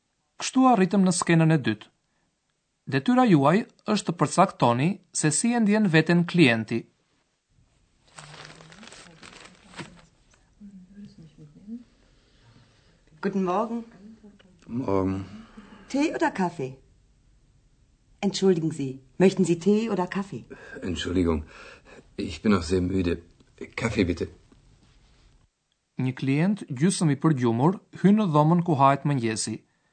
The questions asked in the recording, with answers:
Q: Detyra juaj është të përcaktoni se si e ndjen veten klienti.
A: A i është akoma shumë i lodhur dhe prandaj nuk dy gjonë herën e parë kur e pyesin.